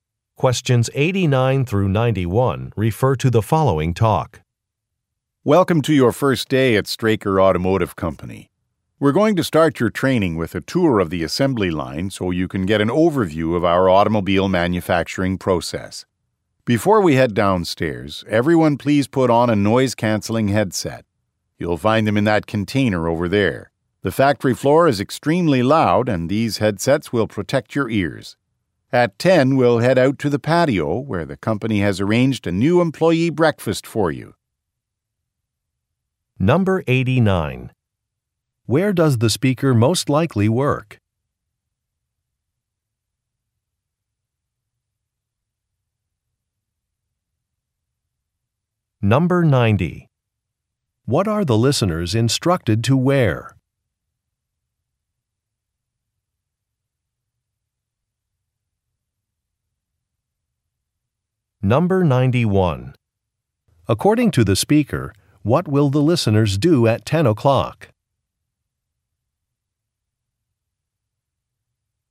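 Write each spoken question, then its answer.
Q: Where does the speaker most likely work?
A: At a car factory

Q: What are the listeners instructed to wear?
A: Noise-canceling headsets

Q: According to the speaker, what will the listeners do at 10 o'clock?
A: Have a new employee breakfast on the patio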